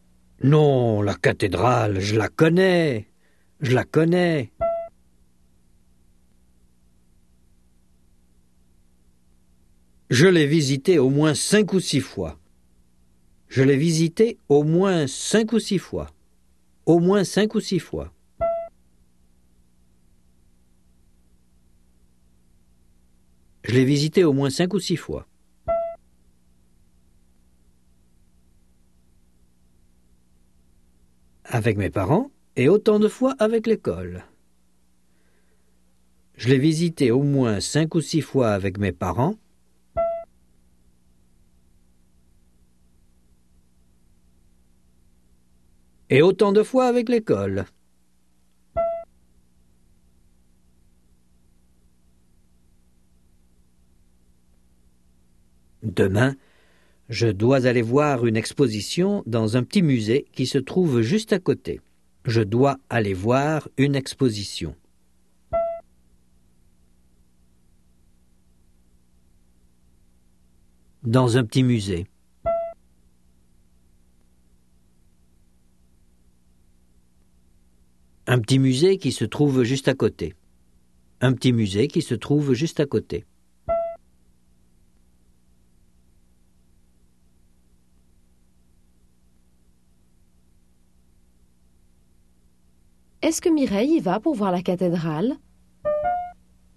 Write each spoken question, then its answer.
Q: Est-ce que Mireille y va pour voir la cathédrale?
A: Non, elle va voir une exposition dans un petit musée qui se trouve juste à côté de la cathédrale.